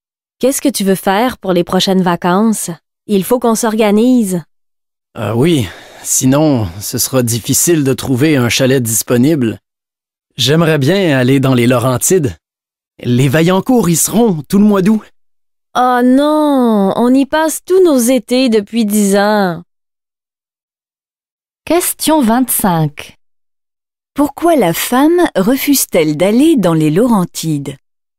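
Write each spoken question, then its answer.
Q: Pourquoi la femme refuse-t-elle d'aller dans les Laurentides?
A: Parce qu'ils y passent tous leurs étés depuis 10 ans.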